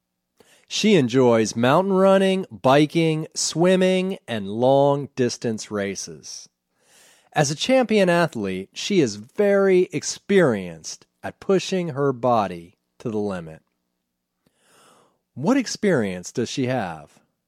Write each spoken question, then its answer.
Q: What experience does she have?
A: She has experience pushing her body to the limit.